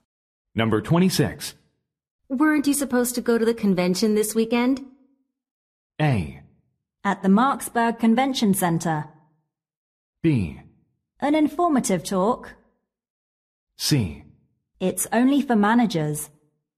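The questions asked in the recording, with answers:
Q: Weren't you supposed to go to the convention this weekend?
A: C: It's only for managers.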